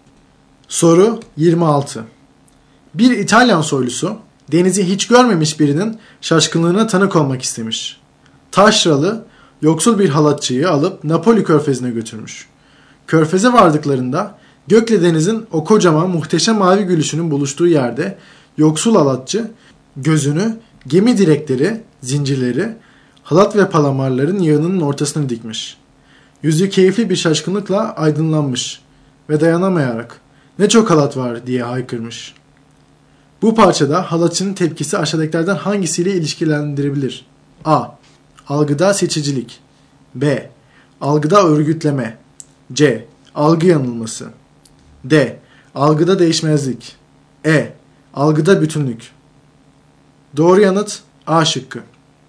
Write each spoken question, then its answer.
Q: Bu parçada halatçının tepkisi aşağıdakilerden hangisiyle ilişkilendirebilir?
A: Doğru yanıt A şıkkı.